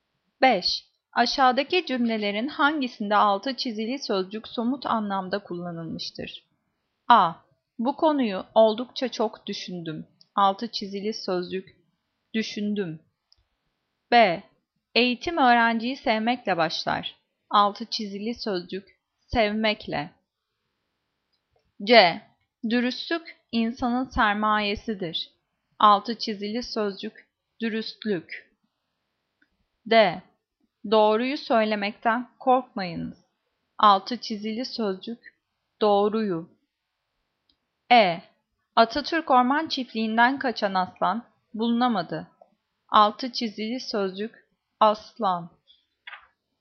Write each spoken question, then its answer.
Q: Aşağıdaki cümlelerin hangisinde altı çizili sözcük somut anlamda kullanılmıştır?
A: Cevap E. Atatürk Orman Çiftliği'nden kaçan aslan bulunamadı.